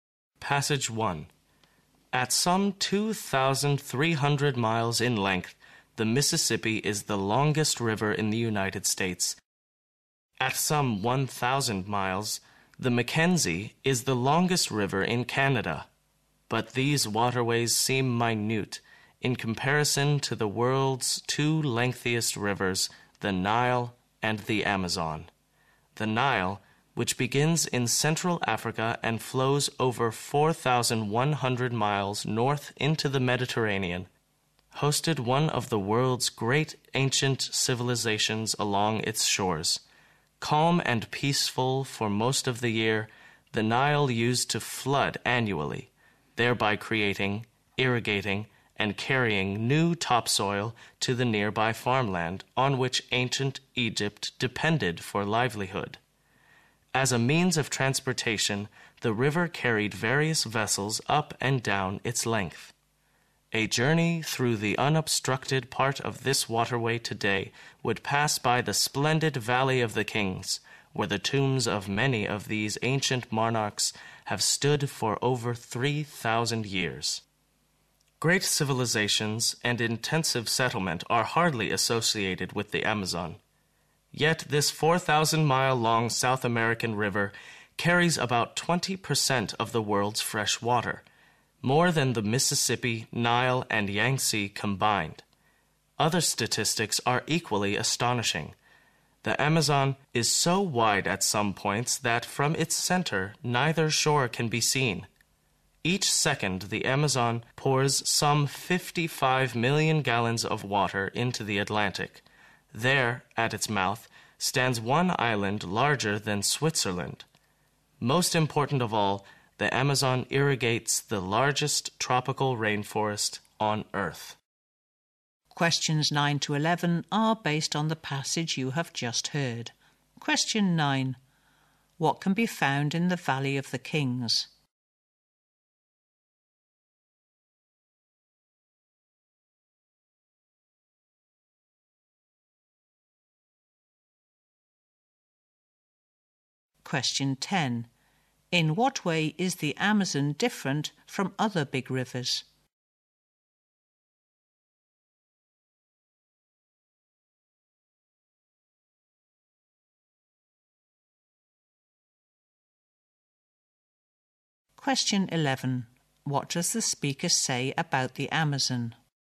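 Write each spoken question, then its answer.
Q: What can be found in the Valley of the Kings?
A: Tombs of ancient monarchs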